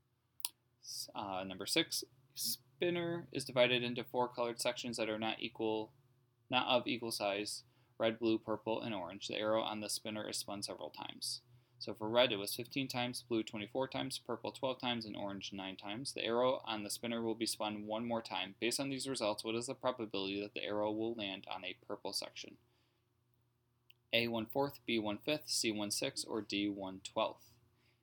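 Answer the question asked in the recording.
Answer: B: 1/5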